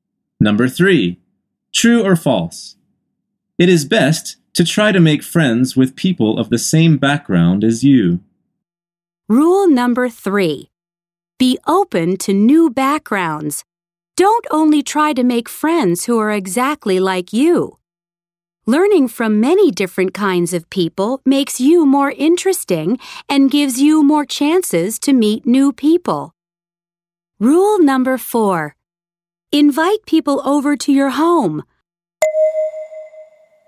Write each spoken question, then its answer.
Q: It is best to try to make friends with people of the same background as you.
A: The answer is false.